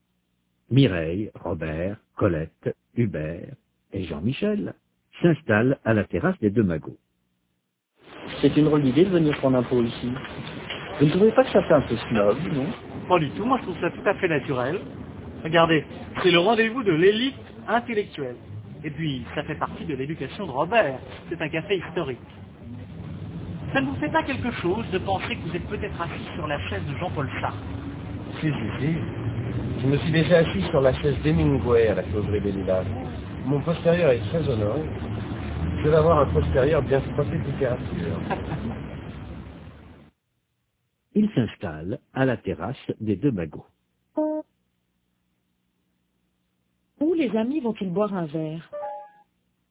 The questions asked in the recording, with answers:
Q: Où les amis vont-ils boire un verre?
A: Aux deux magots.